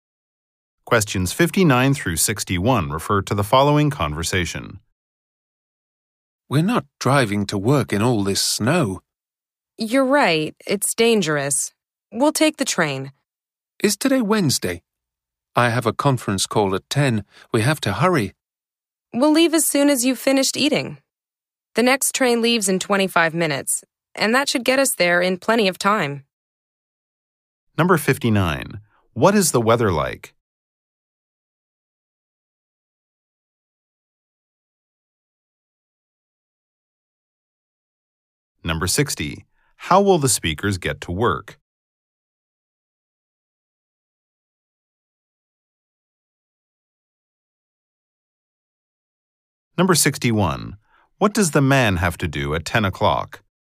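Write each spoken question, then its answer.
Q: What is the weather like?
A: Snowy

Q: How will the speakers get to work?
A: By train

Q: What does the man have to do at 10 o'clock?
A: Have a conference call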